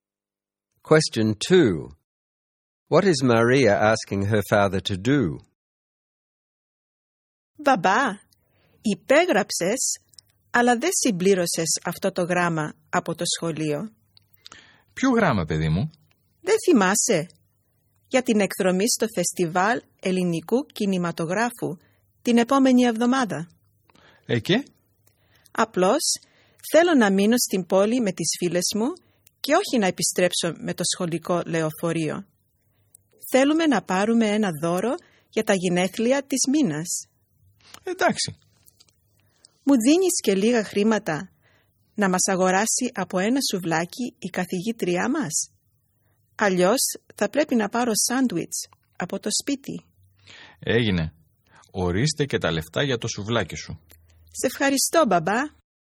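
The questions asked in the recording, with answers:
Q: What is Maria asking her father to do?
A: Complete the school excursion letter so she can stay in town with friends instead of returning on the school bus, and give her money for a souvlaki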